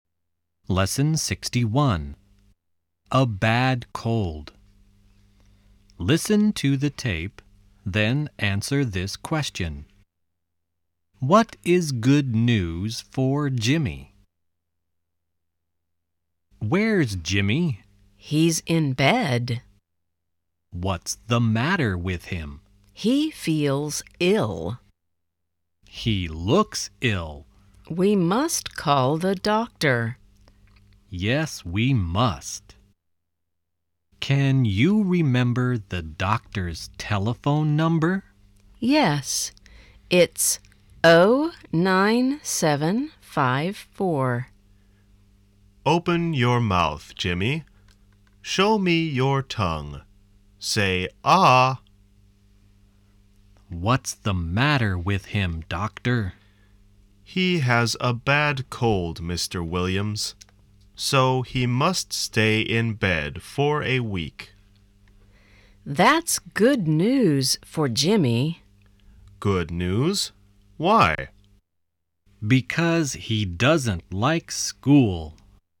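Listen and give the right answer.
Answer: He must stay in bed for a week, so he doesn't have to go to school (he doesn't like school).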